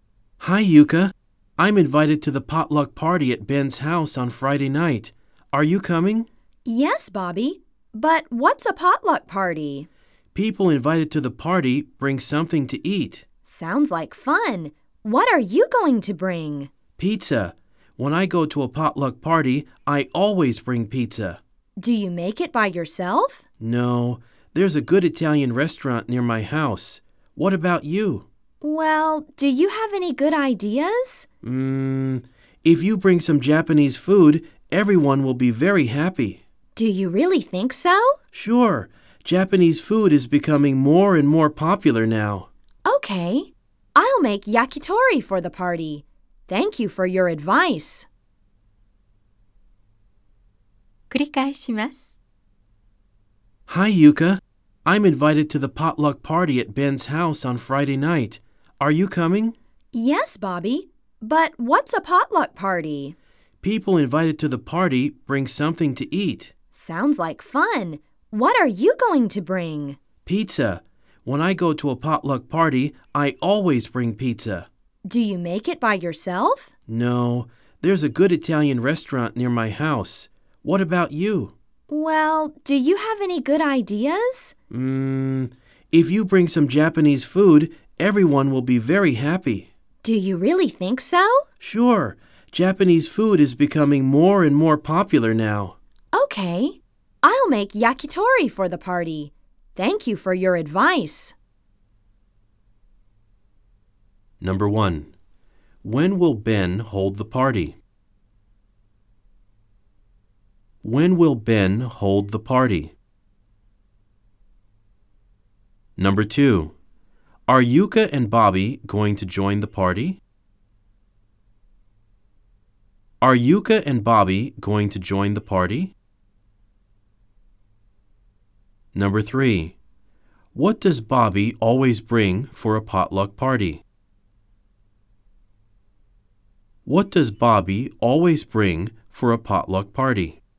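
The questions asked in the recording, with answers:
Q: When will Ben hold the party?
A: On Friday night.

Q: Are Yuka and Bobby going to join the party?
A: Yes, they are.

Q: What does Bobby always bring for a potluck party?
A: Pizza.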